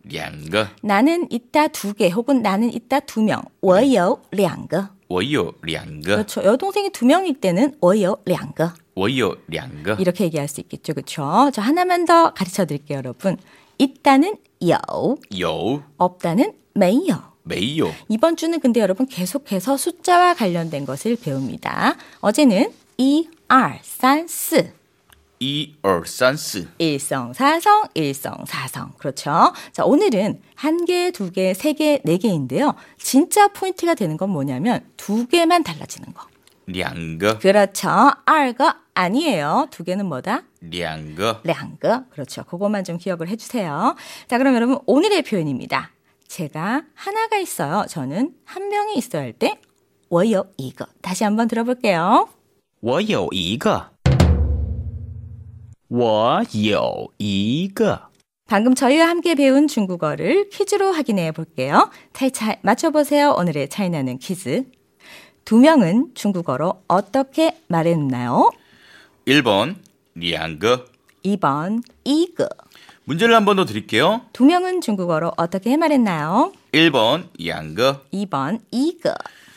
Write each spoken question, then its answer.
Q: 두 명은 중국어로 어떻게 말했나요?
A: 정답은요, 1번 량그.